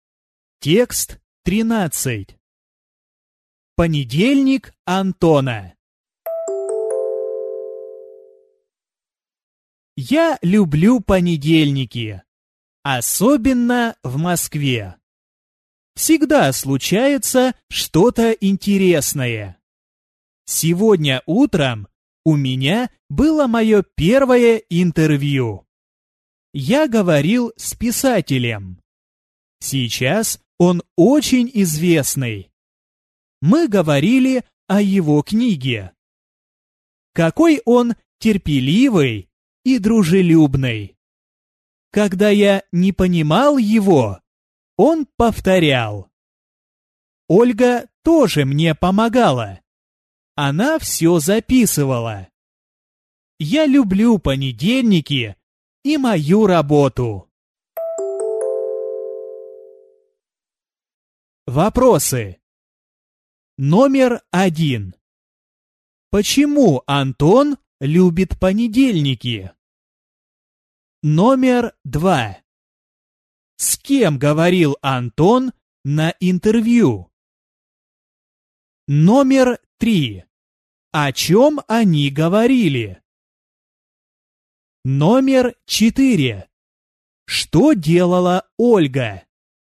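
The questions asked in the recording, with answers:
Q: Почему Антон любит понедельники?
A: Всегда случается что-то интересное.

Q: С кем говорил Антон на интервью?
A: С писателем.

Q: О чем они говорили?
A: О его книге.

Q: Что делала Ольга?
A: Помогала, все записывала.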